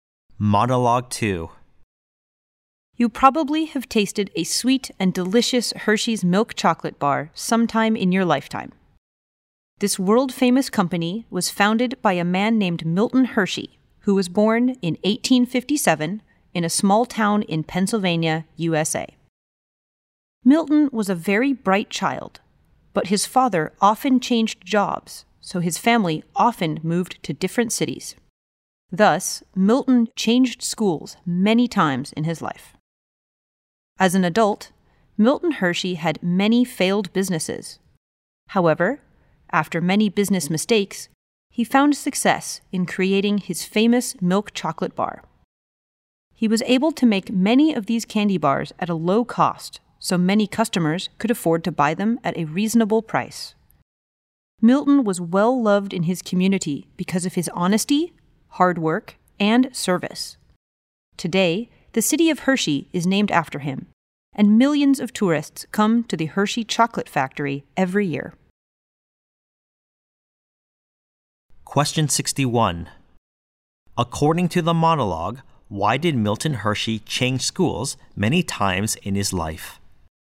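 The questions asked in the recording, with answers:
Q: According to the monologue, why did Milton Hershey change schools many times in his life?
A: His father often changed jobs, so the family often moved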